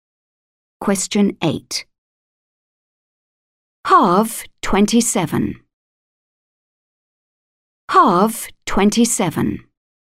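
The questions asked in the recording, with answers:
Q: Halve 27.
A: 13.5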